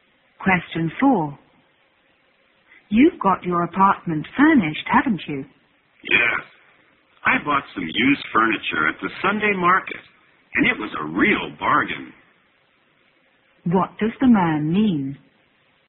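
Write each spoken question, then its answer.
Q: What does the man mean?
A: He furnished his apartment cheaply with used furniture from the Sunday market.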